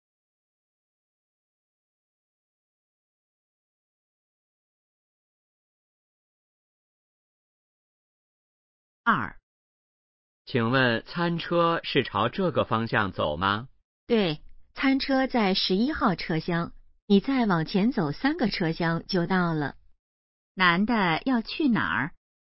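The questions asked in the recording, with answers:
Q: 男的要去哪儿?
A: 餐车(11号车厢)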